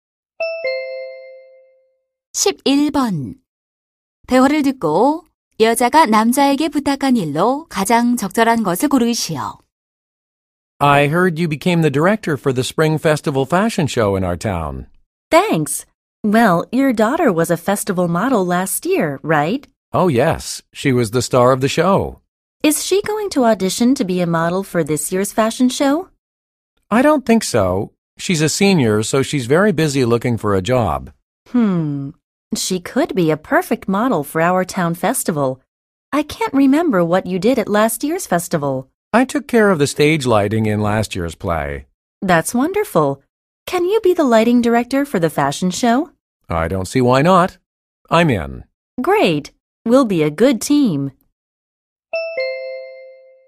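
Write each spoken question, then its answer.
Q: 대화를 듣고 여자가 남자에게 부탁한 일로 가장 적절한 것을 고르시오.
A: 패션쇼의 조명 감독을 맡아 달라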